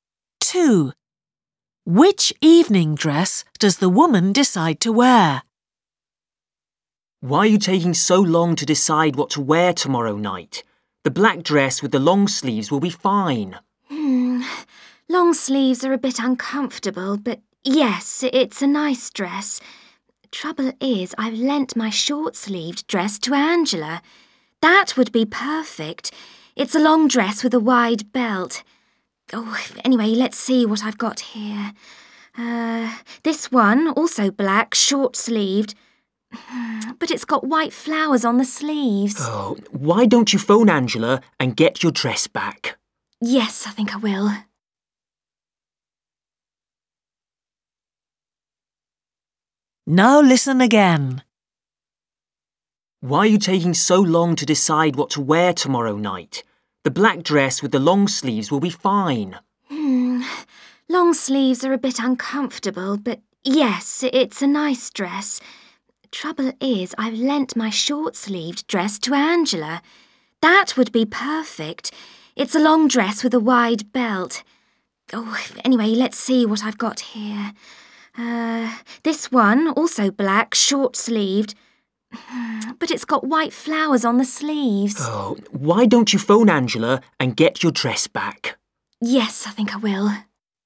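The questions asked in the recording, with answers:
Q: Which evening dress does the woman decide to wear?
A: The long short-sleeved dress with a wide belt (lent to Angela)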